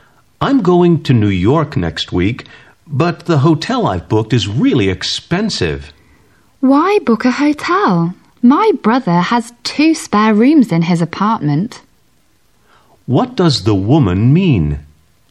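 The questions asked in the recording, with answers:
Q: What does the woman mean?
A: He could stay in her brother's apartment, which has two spare rooms, instead of a hotel.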